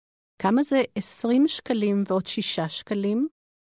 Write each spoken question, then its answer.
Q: כמה זה 20 שקלים ועוד 6 שקלים?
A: 26 שקלים.